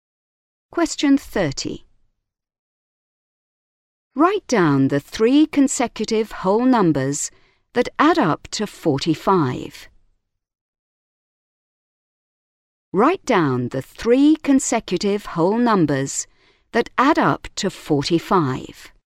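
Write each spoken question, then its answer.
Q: Write down the three consecutive whole numbers that add up to 45.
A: 14, 15, 16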